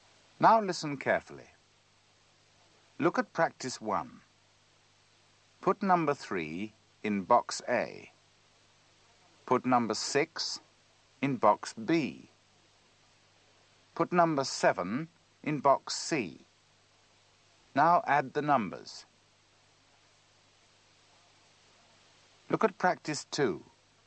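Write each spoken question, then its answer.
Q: Now add the numbers.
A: 16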